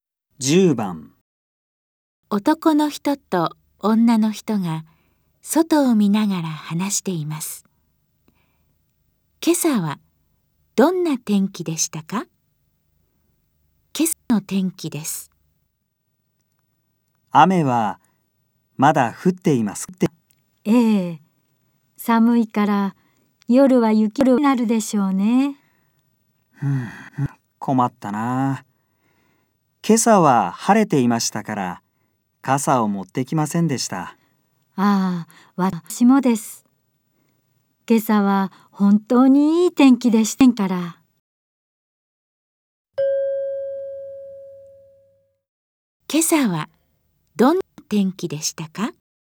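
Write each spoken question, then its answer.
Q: 今朝はどんな天気でしたか?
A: 晴れ(いい天気)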